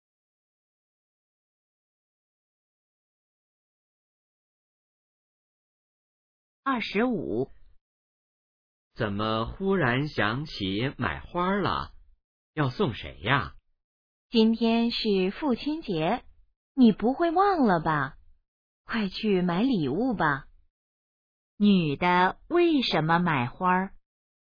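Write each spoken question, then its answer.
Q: 女的为什么买花?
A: 今天是父亲节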